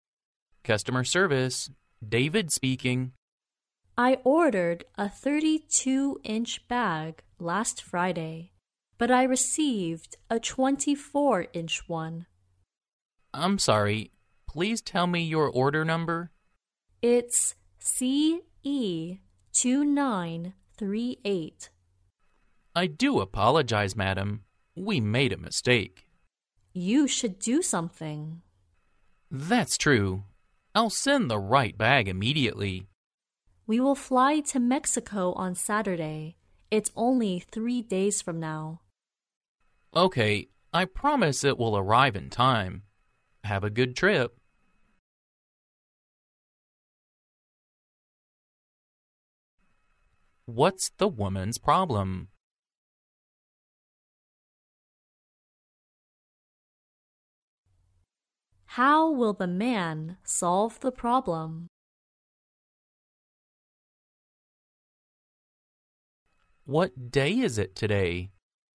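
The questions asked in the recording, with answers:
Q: What's the woman's problem?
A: She received a 24-inch bag instead of the 32-inch one she ordered.

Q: How will the man solve the problem?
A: He will send the right bag immediately.

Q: What day is it today?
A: Wednesday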